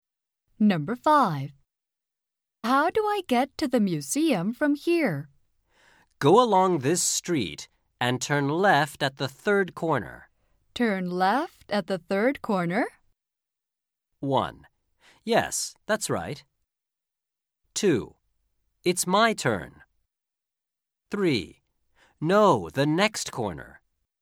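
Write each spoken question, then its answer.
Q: Turn left at the third corner?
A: 1: Yes, that's right.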